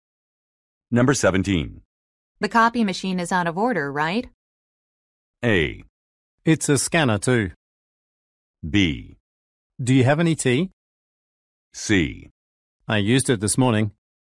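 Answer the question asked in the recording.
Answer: C: I used it this morning.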